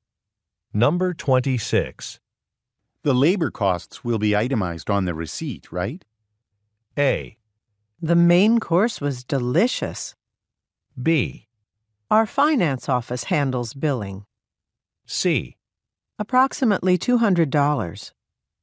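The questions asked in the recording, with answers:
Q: The labor costs will be itemized on the receipt, right?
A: B: Our finance office handles billing.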